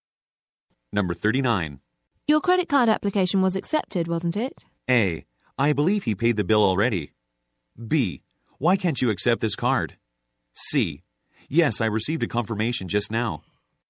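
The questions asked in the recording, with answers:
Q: Your credit card application was accepted, wasn't it?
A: C: Yes, I received a confirmation just now.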